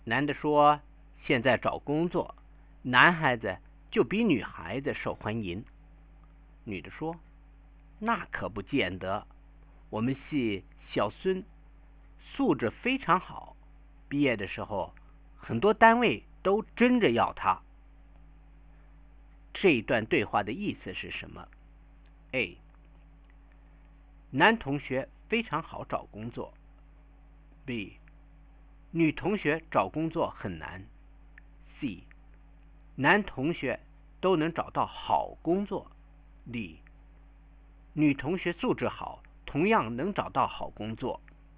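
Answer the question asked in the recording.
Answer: D: 女同学素质好,同样能找到好工作。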